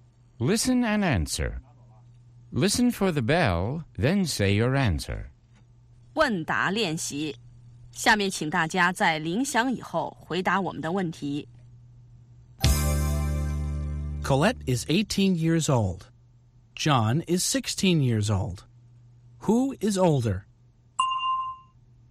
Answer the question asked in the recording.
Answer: Colette is. Colette is older than John.